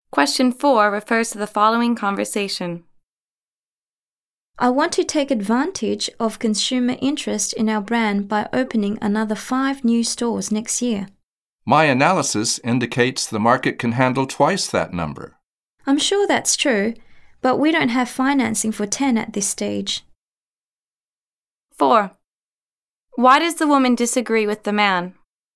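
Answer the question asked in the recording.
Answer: They don't have financing for 10 new stores yet.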